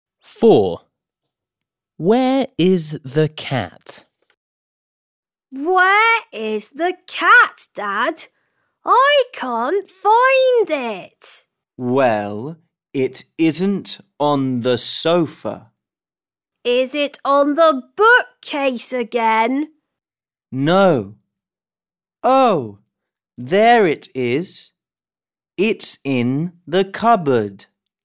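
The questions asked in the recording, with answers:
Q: Where is the cat?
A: In the cupboard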